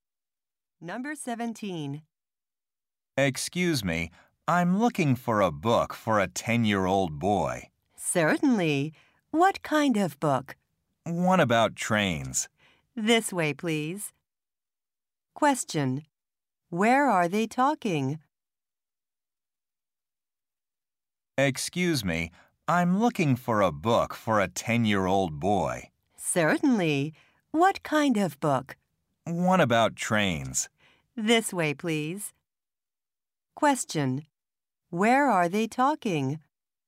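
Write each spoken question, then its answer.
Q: Where are they talking?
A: In a bookstore.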